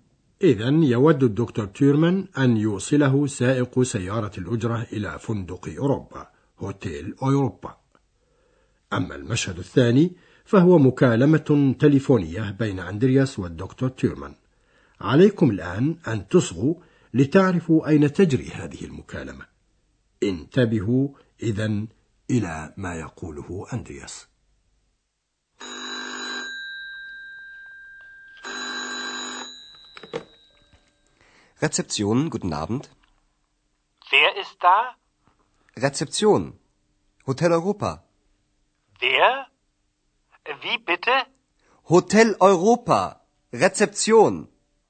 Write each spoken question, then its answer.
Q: عليكم الآن أن تصغوا لتعرفوا أين تجري هذه المكالمة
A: أظنكم أيها الأعزاء تعرفون الآن فندق أوروبا وأندرياس يتكلم من استقبال الفندق ريتسبسيون